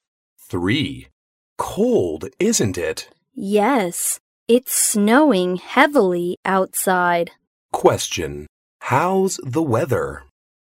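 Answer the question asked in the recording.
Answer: Cold and snowing heavily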